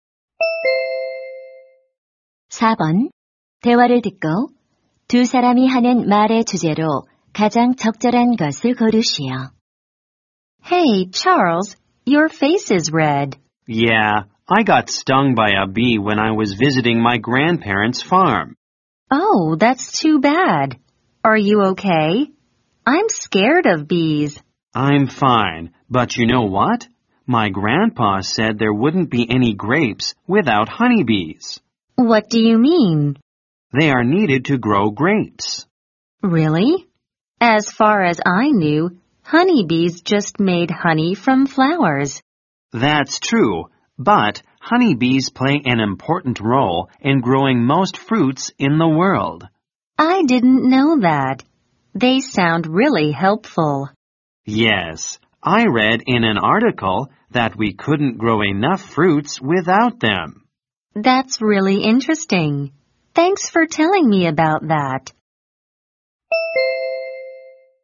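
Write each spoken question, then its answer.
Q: 대화를 듣고 두 사람이 하는 말의 주제로 가장 적절한 것을 고르시오.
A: 과일 재배에서 꿀벌의 중요한 역할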